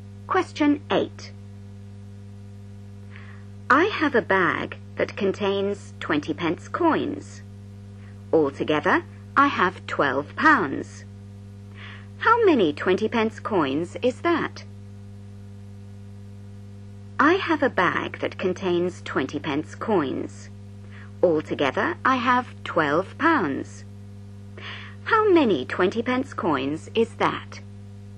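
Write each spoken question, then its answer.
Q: How many 20 pence coins is that?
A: 60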